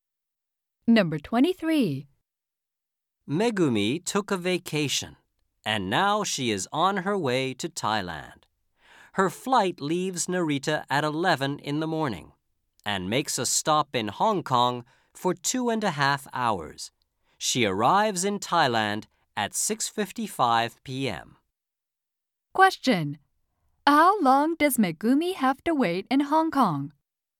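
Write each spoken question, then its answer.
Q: How long does Megumi have to wait in Hong Kong?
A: 2.5 hours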